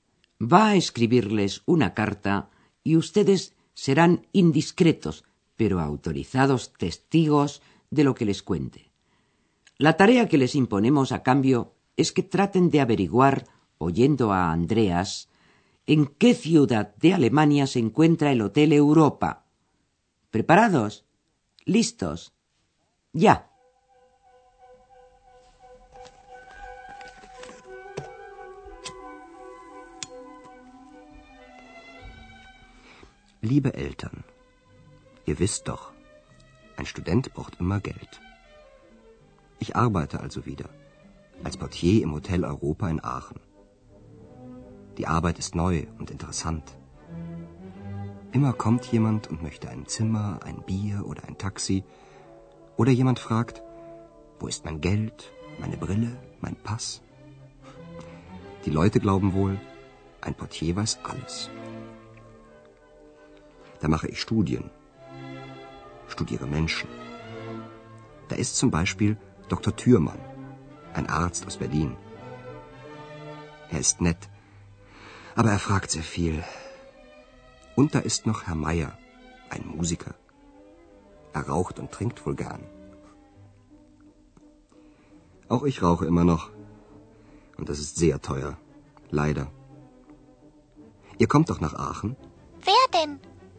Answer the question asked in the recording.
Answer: Es la ciudad de Aquisgrán, en alemán Aachen